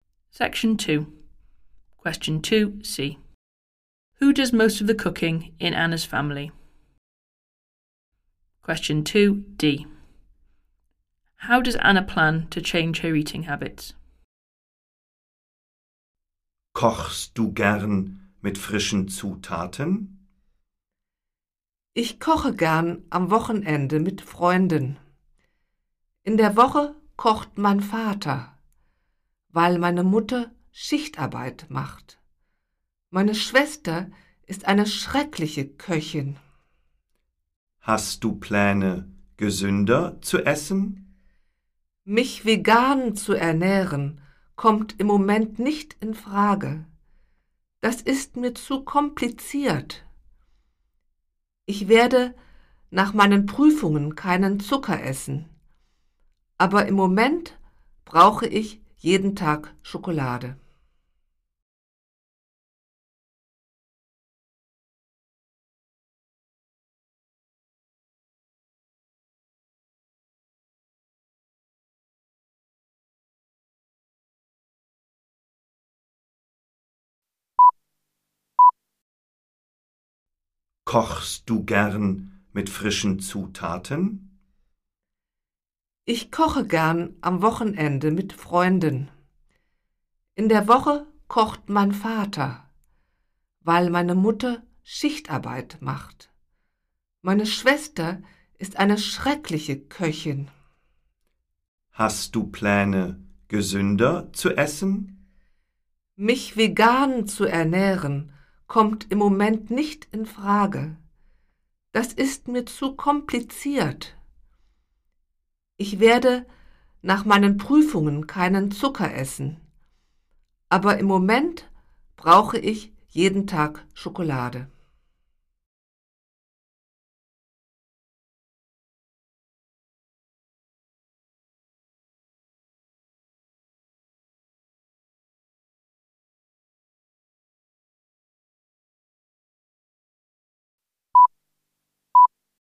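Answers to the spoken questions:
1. Her father (during the week)
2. She won't eat sugar after her exams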